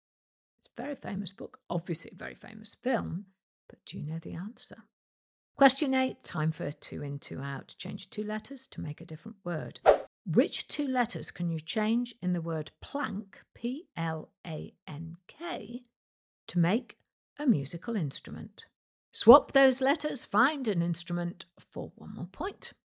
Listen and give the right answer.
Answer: Change the L to an I and the K to an O to get a piano, P-I-A-N-O.